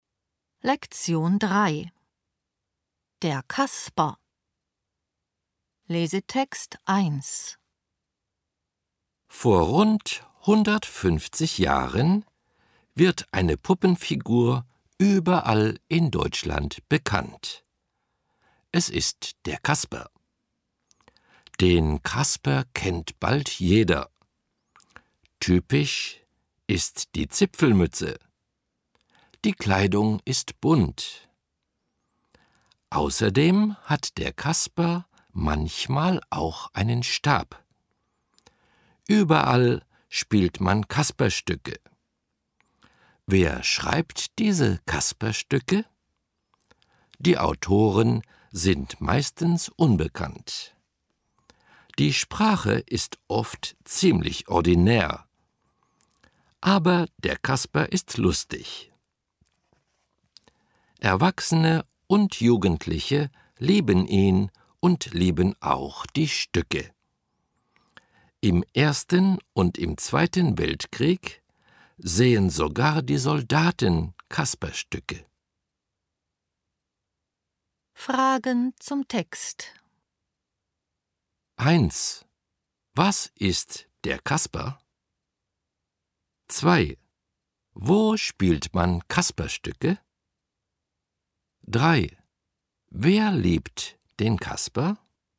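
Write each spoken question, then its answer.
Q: Was ist der Kasper?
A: Eine Puppenfigur

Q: Wo spielt man Kasperstücke?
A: Überall (in Deutschland)

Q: Wer liebt den Kasper?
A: Erwachsene und Jugendliche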